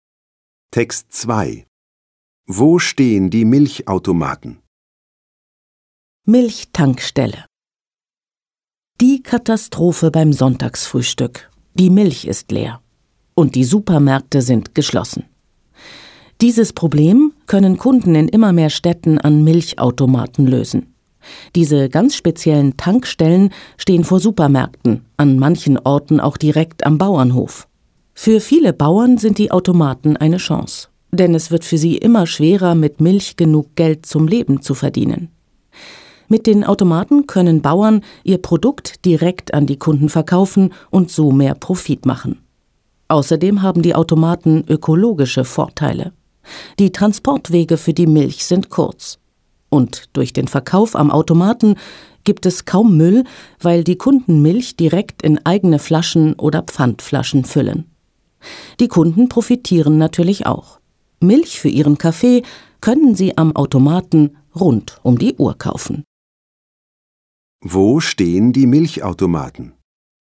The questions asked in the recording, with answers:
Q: Wo stehen die Milchautomaten?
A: Sie stehen vor Supermärkten und manchmal direkt am Bauernhof.